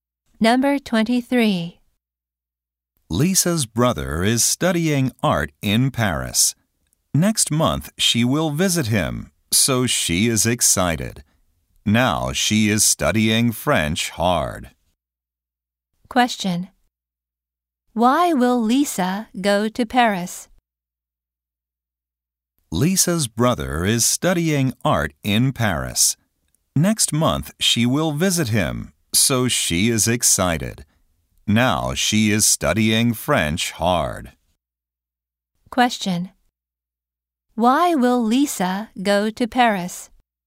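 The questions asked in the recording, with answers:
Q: Question. Why will Lisa go to Paris?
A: To visit her brother.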